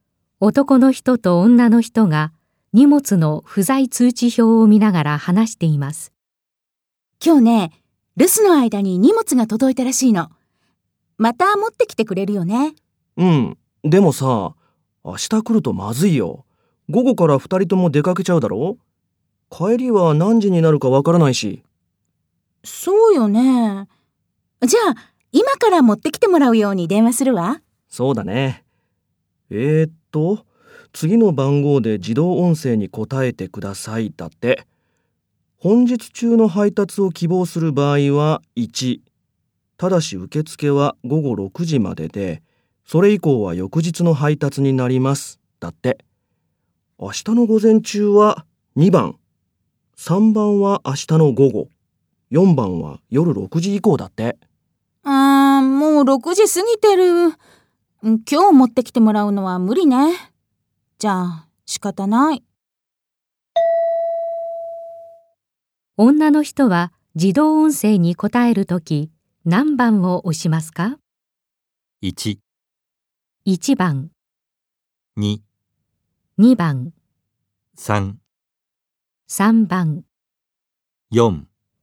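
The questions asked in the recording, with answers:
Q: 女の人は自動音声に答えるとき何番を押しますか?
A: 2番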